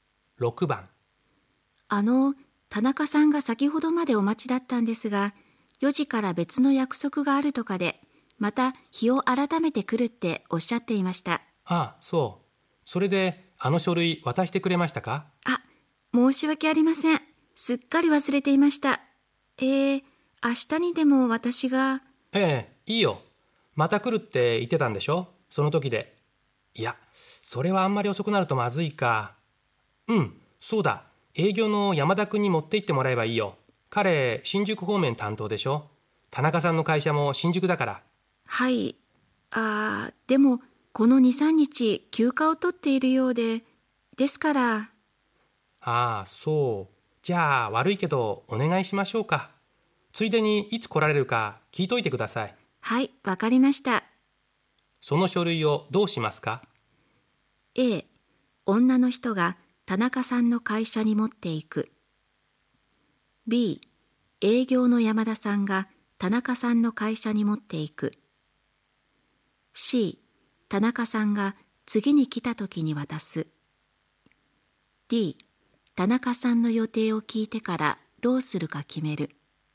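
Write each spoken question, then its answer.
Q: その書類をどうしますか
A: A: 女の人が田中さんの会社に持っていく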